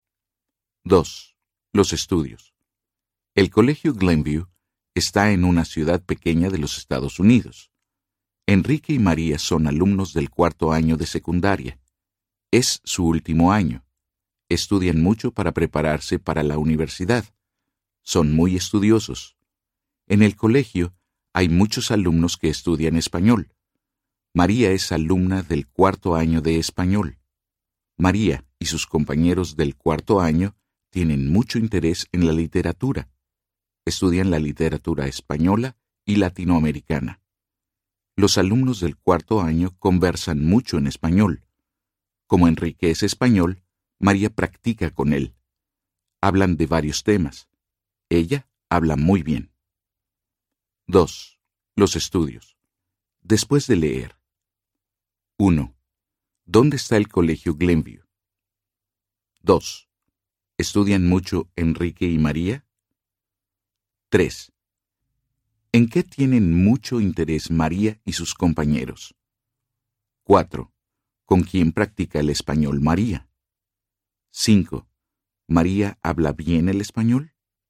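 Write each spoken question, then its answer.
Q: ¿Dónde está el Colegio Glenview?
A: En una ciudad pequeña de los Estados Unidos

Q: ¿Estudian mucho Enrique y María?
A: Sí, estudian mucho

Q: ¿En qué tienen mucho interés María y sus compañeros?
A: En la literatura

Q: ¿Con quién practica el español María?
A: Con Enrique

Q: ¿María habla bien el español?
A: Sí, habla muy bien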